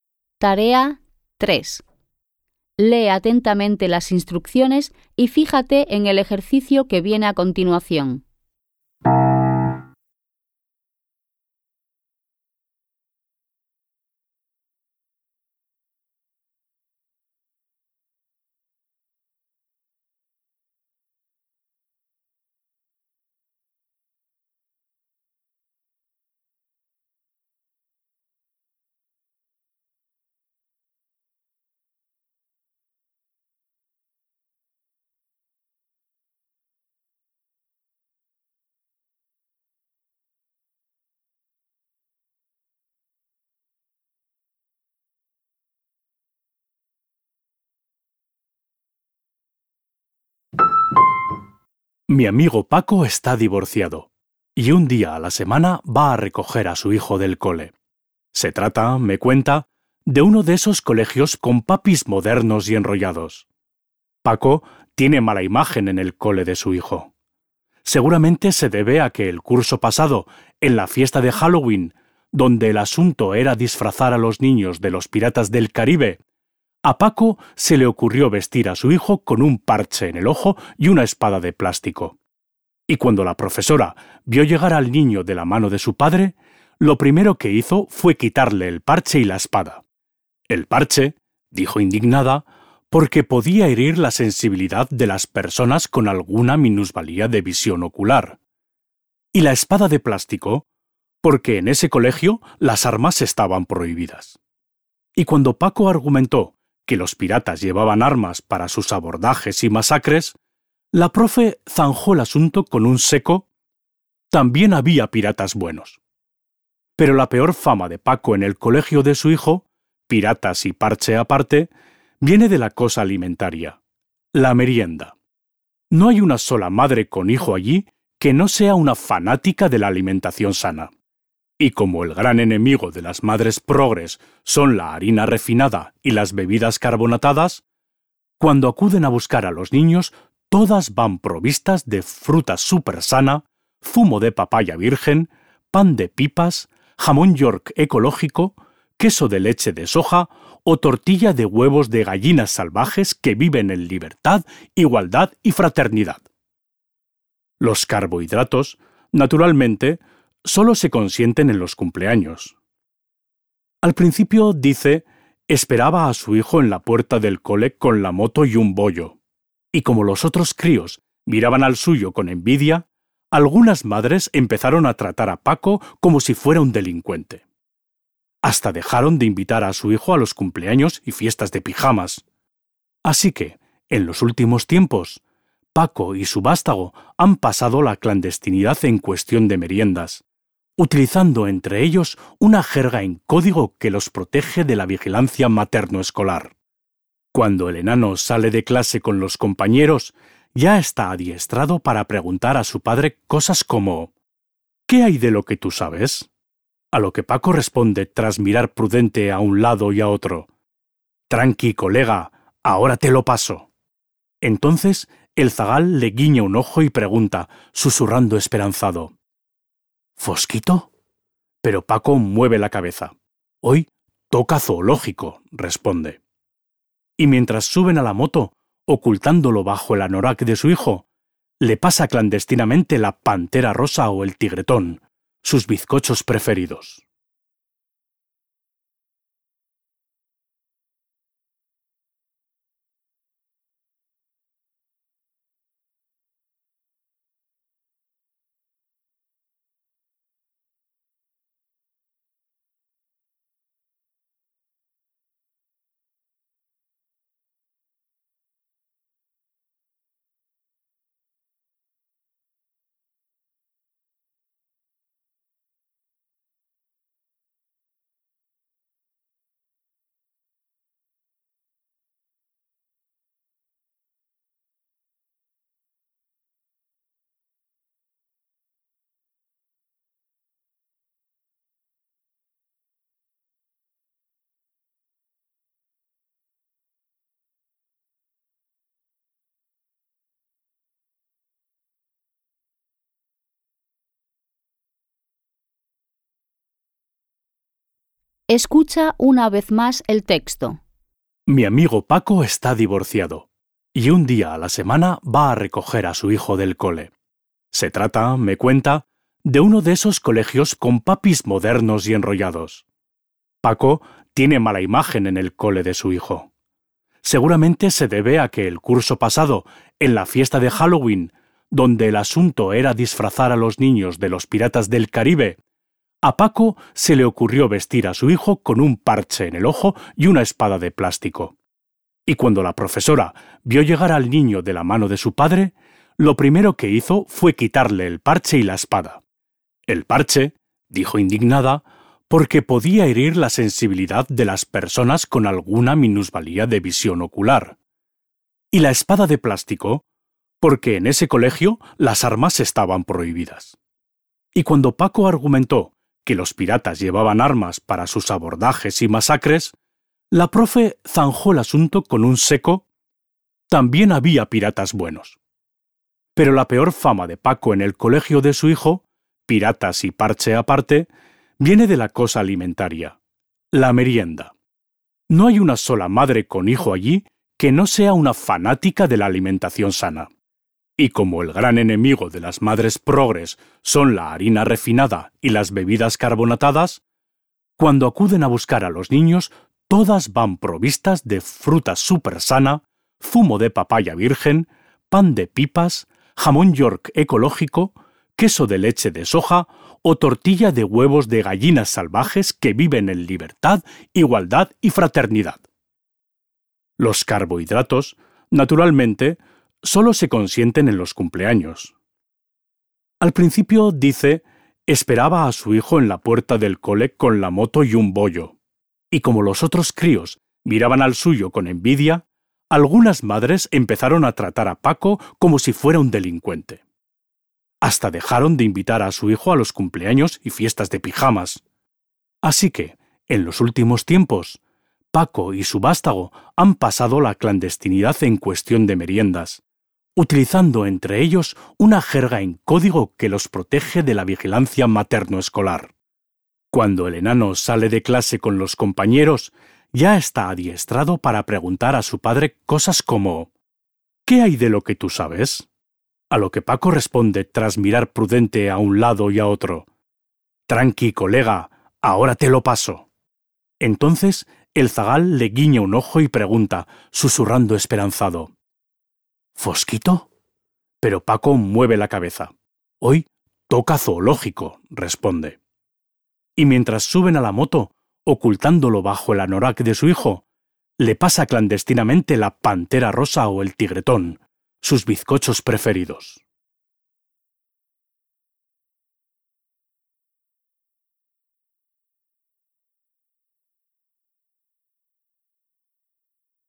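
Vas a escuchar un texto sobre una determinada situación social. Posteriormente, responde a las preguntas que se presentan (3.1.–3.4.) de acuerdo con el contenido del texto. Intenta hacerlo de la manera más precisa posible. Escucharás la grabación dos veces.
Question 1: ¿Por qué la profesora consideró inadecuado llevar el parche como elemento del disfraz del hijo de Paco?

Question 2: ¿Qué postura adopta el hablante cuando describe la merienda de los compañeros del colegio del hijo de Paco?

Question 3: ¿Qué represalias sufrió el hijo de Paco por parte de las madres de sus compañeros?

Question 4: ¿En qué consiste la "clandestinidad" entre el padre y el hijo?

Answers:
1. Porque podía herir la sensibilidad de las personas con alguna discapacidad visual.
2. Una postura irónica/burlona hacia la obsesión de las madres por la comida sana.
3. Dejaron de invitarlo a los cumpleaños y fiestas de pijamas.
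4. Usan una jerga en código y el padre le pasa a escondidas bollos/bizcochos para merendar.

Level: Poziom: dwujęzyczny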